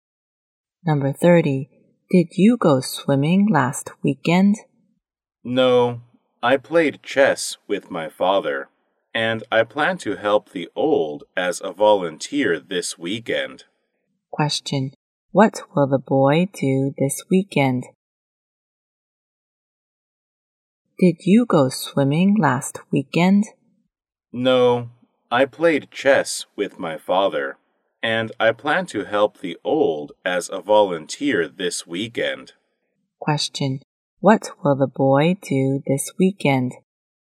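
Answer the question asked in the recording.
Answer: Help the old as a volunteer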